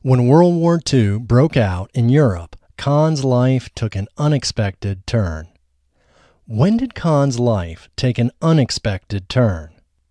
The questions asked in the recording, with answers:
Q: When did Khan's life take an unexpected turn?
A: Khan's life took an unexpected turn when World War II broke out in Europe.